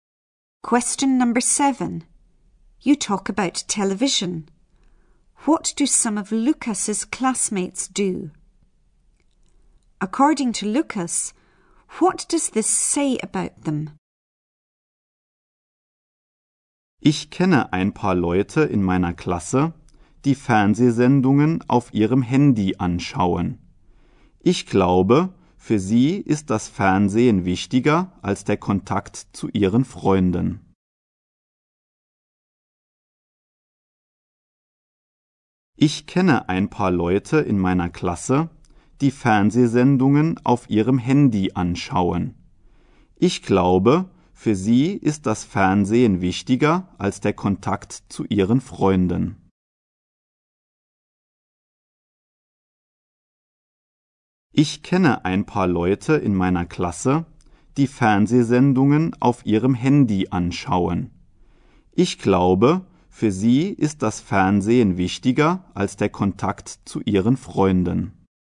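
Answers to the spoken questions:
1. They watch TV programmes on their mobile phones
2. TV is more important to them than contact with their friends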